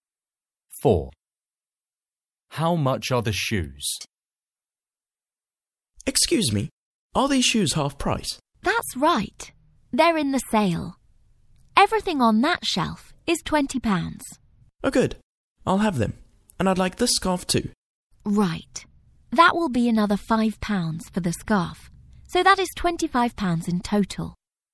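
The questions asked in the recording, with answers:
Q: How much are the shoes?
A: £20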